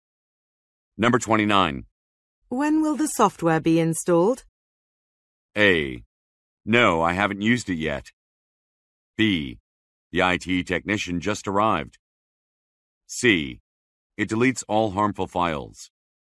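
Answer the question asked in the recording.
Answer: B: The IT technician just arrived.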